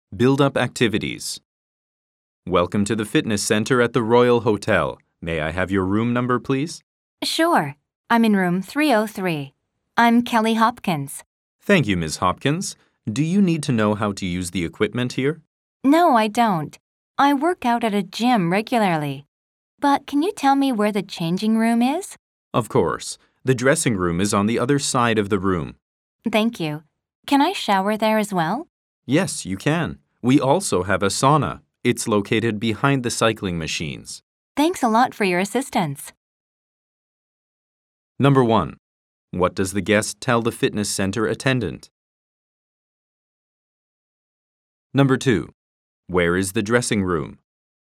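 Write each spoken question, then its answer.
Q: Where is the dressing room?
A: On the other side of the room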